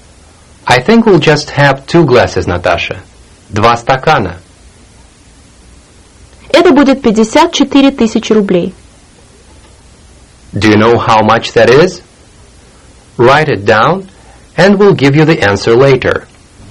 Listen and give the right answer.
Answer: 54,000 rubles.